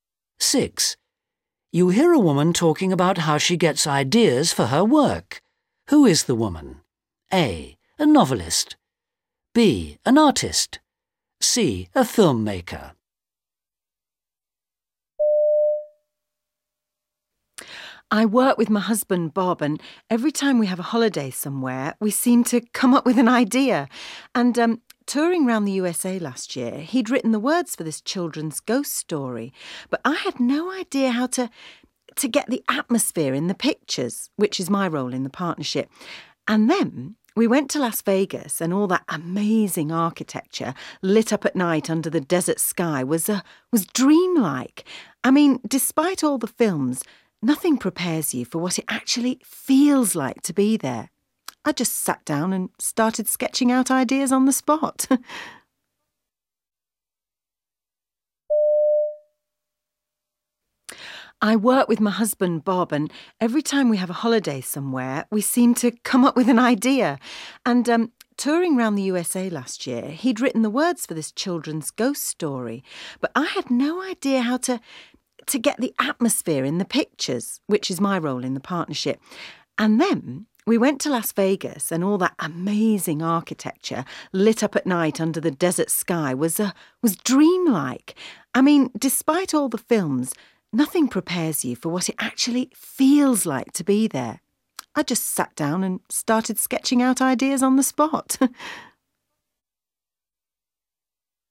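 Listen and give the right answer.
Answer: B: An artist.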